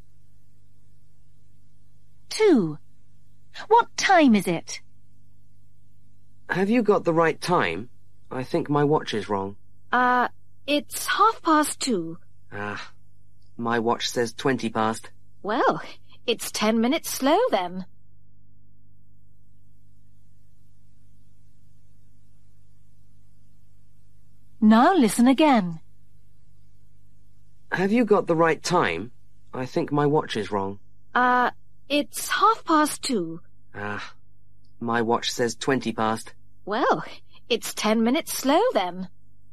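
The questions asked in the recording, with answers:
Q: What time is it?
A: 2:30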